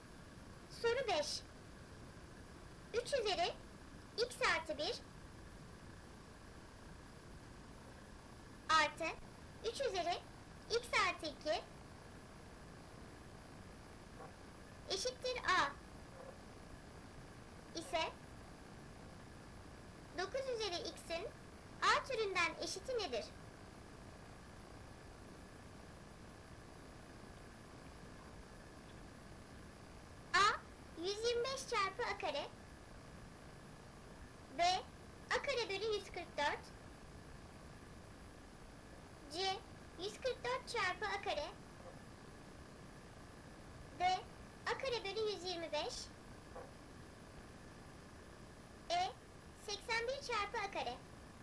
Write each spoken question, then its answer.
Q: eşittir a ise 9 üzeri x'in a türünden eşiti nedir?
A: Doğru cevap a kare bölü 144.